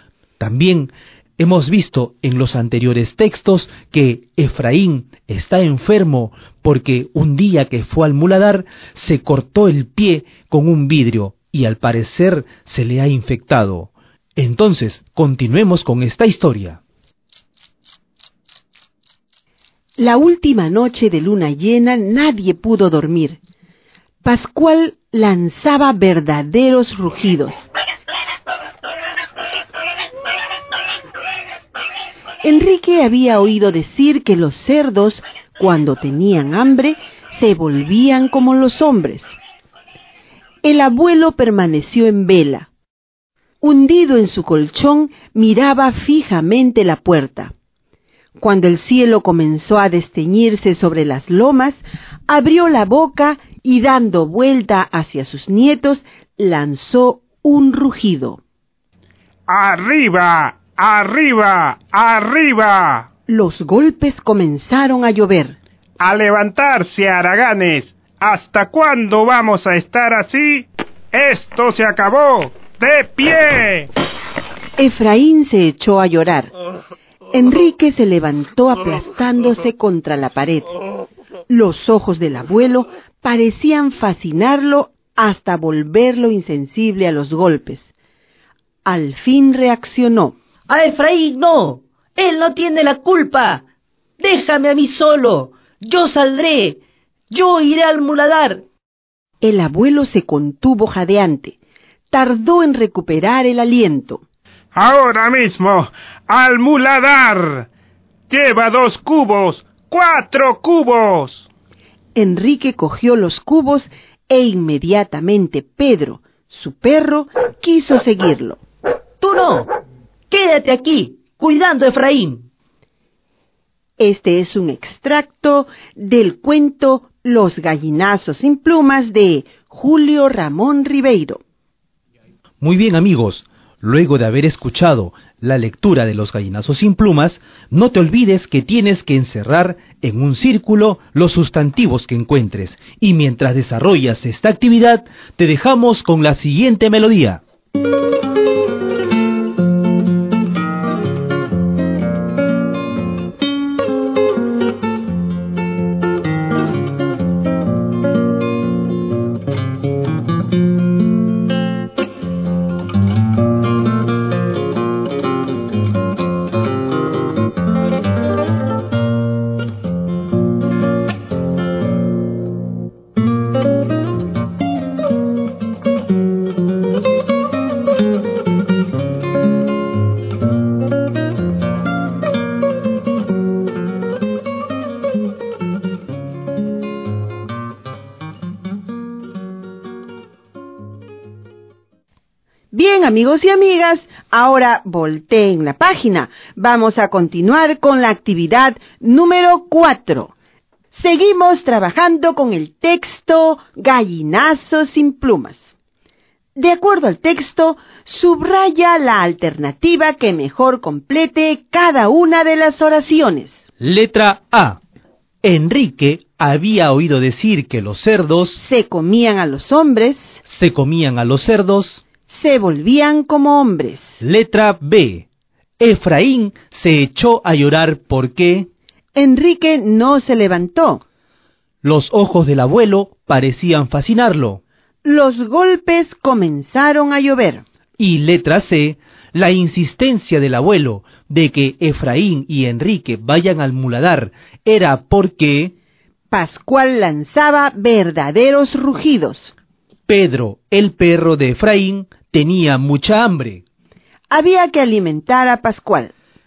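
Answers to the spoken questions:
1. se volvían como hombres
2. Los golpes comenzaron a llover
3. Había que alimentar a Pascual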